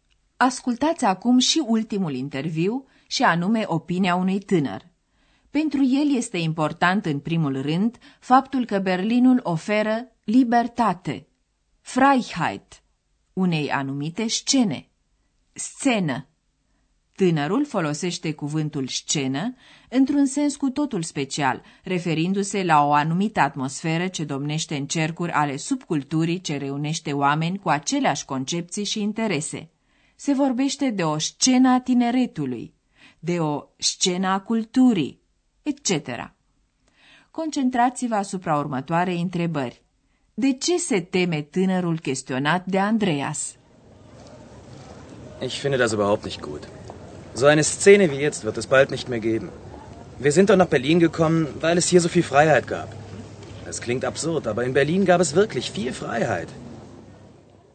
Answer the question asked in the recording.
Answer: Tânărul se teme că o astfel de scenă, ca cea de acum, în curând nu va mai exista.